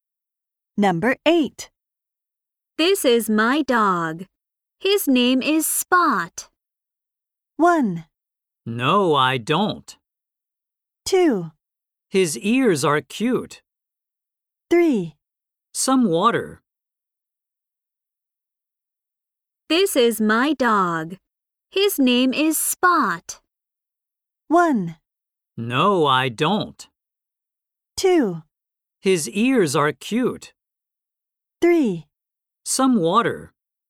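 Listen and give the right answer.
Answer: 2: His ears are cute.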